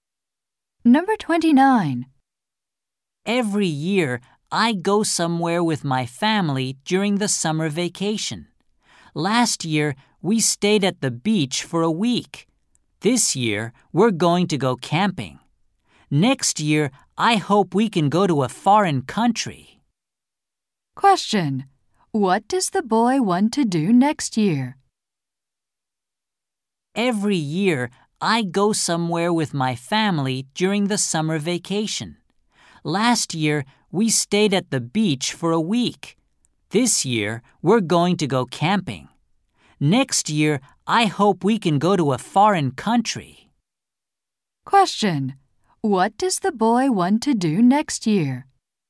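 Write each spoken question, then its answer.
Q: What does the boy want to do next year?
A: Go to a foreign country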